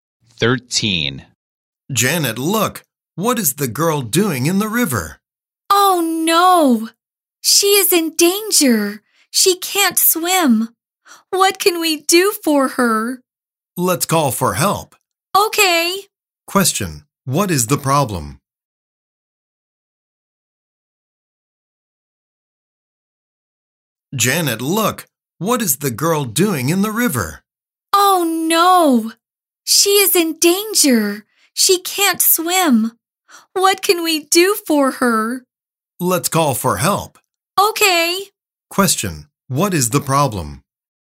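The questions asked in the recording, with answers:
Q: What is the problem?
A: A girl in the river can't swim and is in danger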